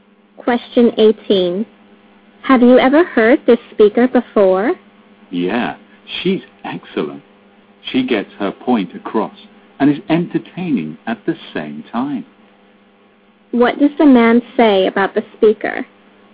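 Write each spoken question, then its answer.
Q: What does the man say about the speaker?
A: She is excellent: she gets her point across and is entertaining.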